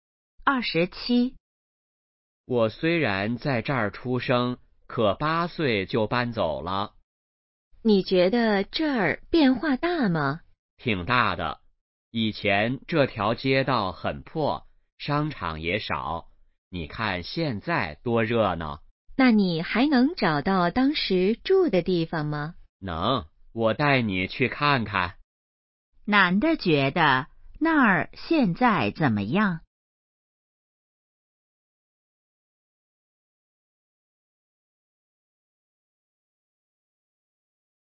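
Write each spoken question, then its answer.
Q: 男的觉得那儿现在怎么样?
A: 很热闹,变化大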